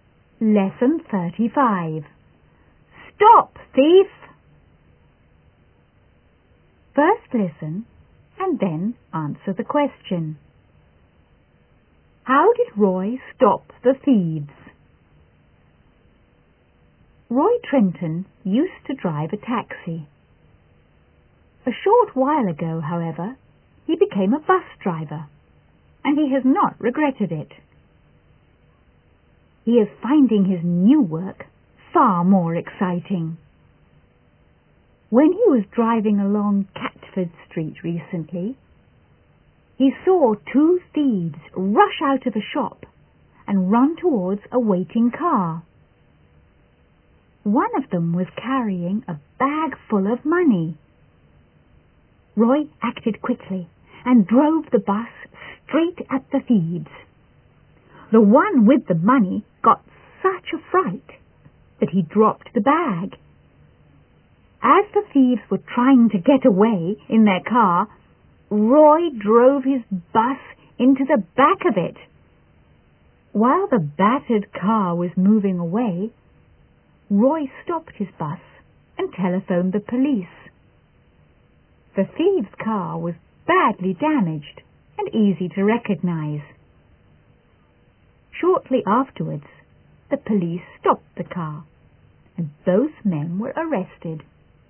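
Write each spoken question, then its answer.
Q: How did Roy stop the thieves?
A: He drove his bus straight at them and then into the back of their car, and phoned the police.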